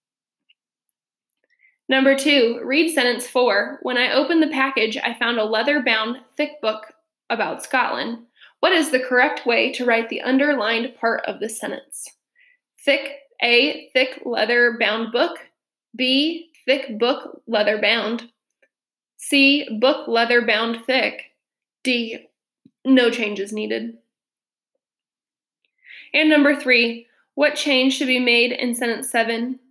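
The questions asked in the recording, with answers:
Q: What is the correct way to write the underlined part of the sentence?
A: A: Thick leather-bound book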